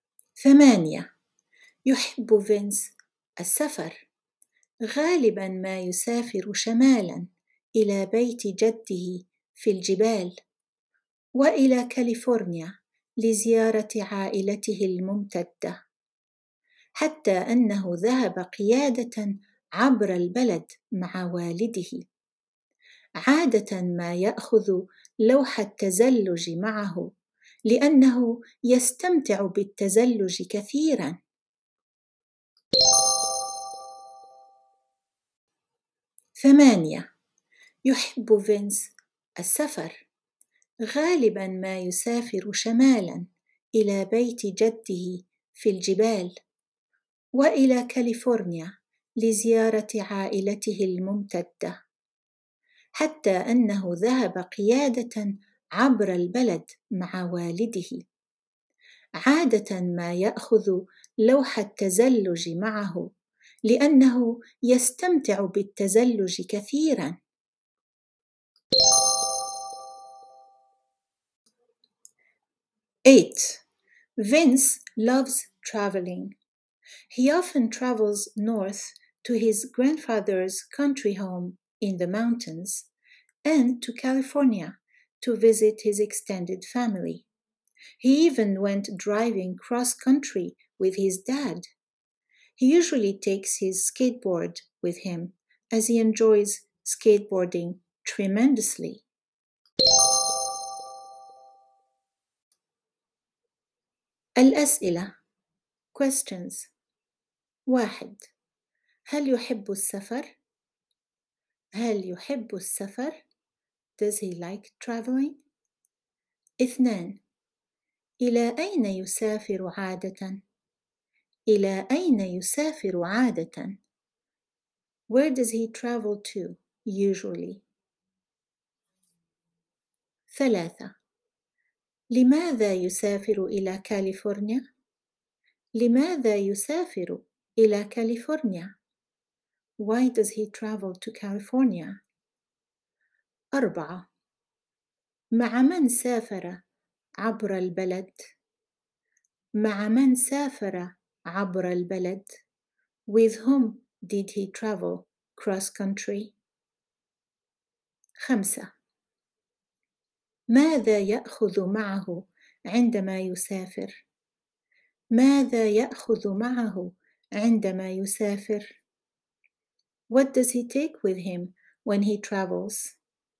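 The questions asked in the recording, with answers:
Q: هل يحب السفر؟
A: نعم، يحب السفر

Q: إلى أين يسافر عادةً؟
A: شمالا إلى بيت جده في الجبال وإلى كاليفورنيا

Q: لماذا يسافر إلى كاليفورنيا؟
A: لزيارة عائلته الممتدة

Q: مع من سافر عبر البلد؟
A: مع والده

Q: ماذا يأخذ معه عندما يسافر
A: لوح التزلج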